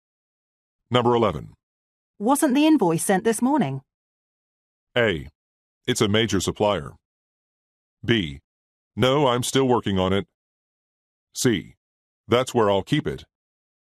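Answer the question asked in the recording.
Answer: B: No, I'm still working on it.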